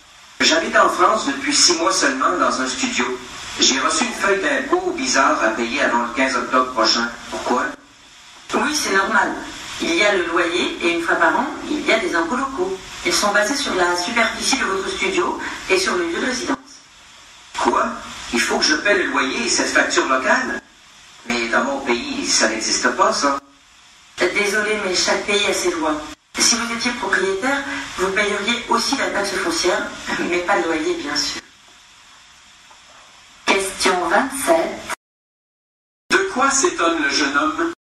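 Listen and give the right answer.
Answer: De devoir payer des impôts locaux en plus du loyer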